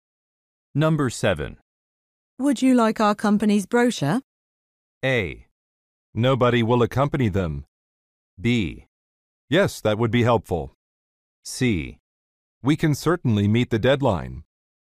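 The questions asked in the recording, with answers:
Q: Would you like our company's brochure?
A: B: Yes, that would be helpful.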